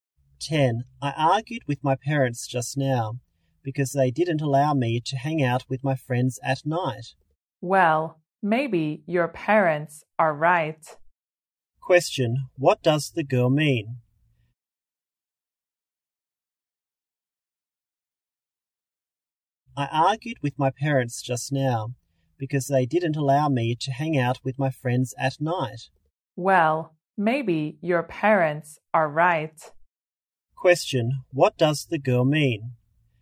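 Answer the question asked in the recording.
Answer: Maybe the parents are right.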